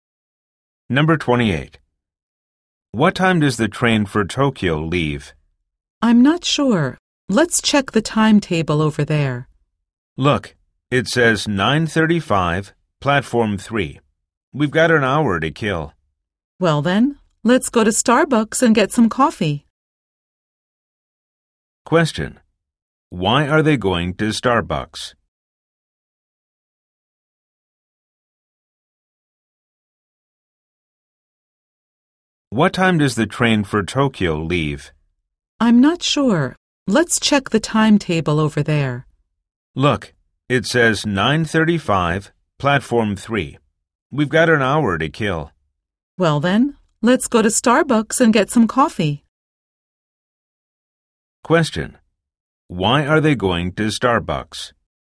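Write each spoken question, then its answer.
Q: Why are they going to Starbucks?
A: They have an hour to wait before their train, so they'll get coffee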